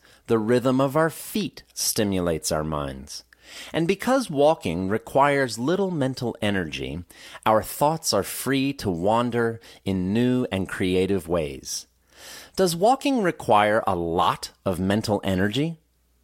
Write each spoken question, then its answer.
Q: Does walking require a lot of mental energy?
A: No, walking doesn't require a lot of mental energy.